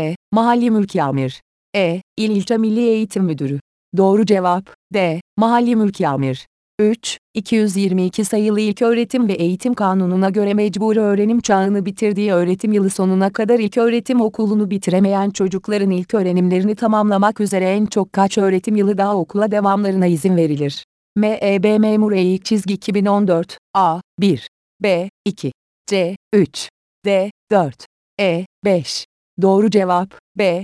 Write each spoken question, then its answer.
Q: 222 sayılı İlköğretim ve Eğitim Kanunu'na göre mecbur öğrenim çağını bitirdiği öğretim yılı sonuna kadar ilköğretim okulunu bitiremeyen çocukların ilk öğrenimlerini tamamlamak üzere en çok kaç öğretim yılı daha okula devamlarına izin verilir?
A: Doğru cevap B.